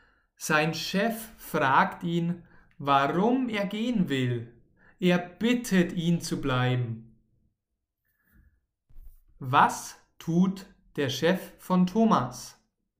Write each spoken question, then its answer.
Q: Was tut der Chef von Thomas?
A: Er fragt ihn, warum er gehen will, und er bittet ihn zu bleiben.